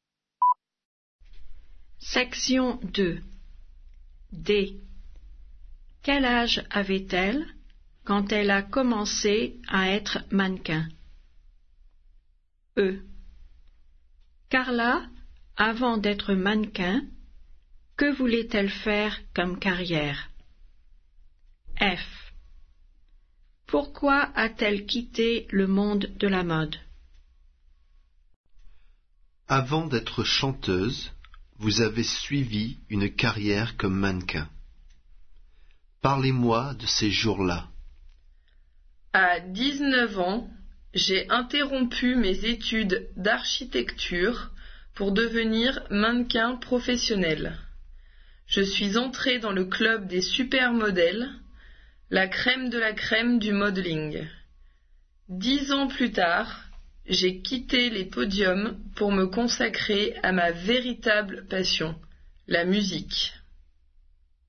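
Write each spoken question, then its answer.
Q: Quel âge avait-elle quand elle a commencé à être mannequin?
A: 19 ans

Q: Carla, avant d'être mannequin, que voulait-elle faire comme carrière?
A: Architecte

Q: Pourquoi a-t-elle quitté le monde de la mode?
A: Pour se consacrer à sa passion, la musique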